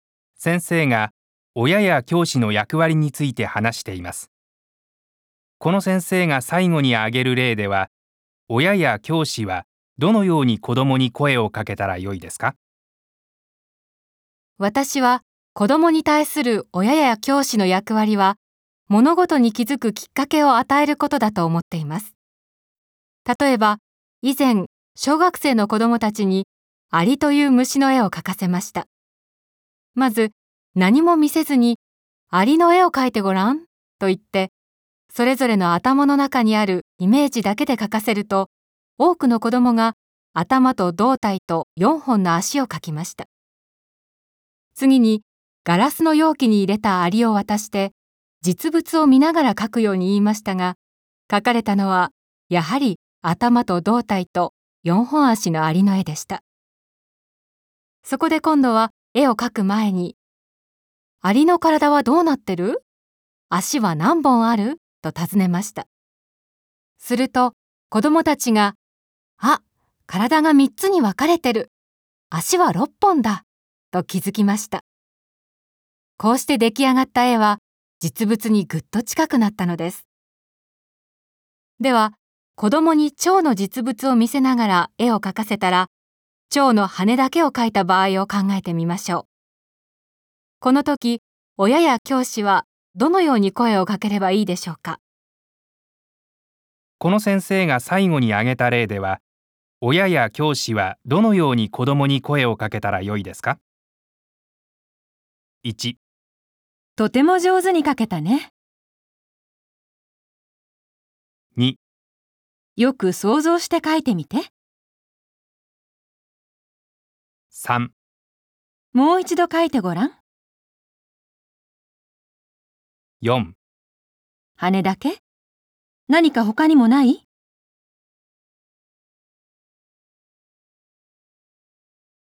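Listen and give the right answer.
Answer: 4: 羽だけ?何か他にもない?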